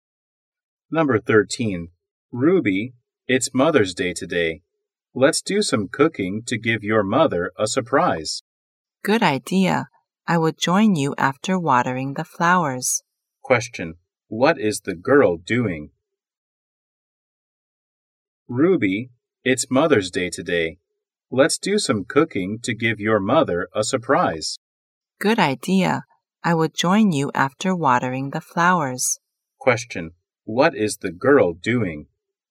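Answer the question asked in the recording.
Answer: Watering the flowers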